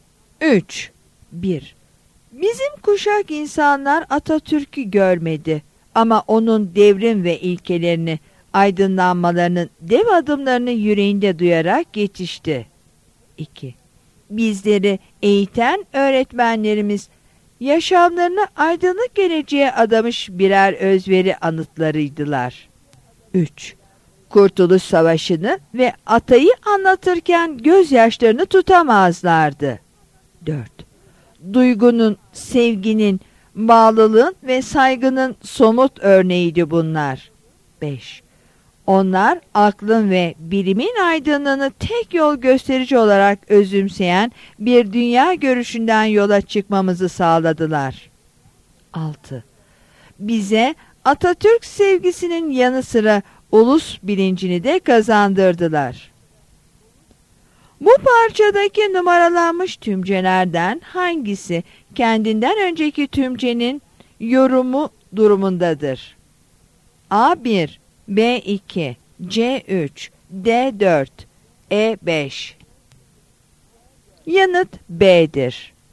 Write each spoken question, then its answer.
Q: Bu parçadaki numaralanmış tümcelerden hangisi kendinden önceki tümcenin yorumu durumundadır?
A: Yanıt B'dir.